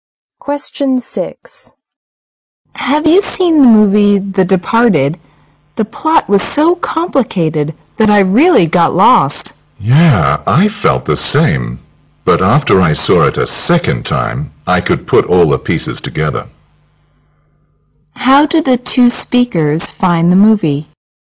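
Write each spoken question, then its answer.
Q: How did the two speakers find the movie?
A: Hard to follow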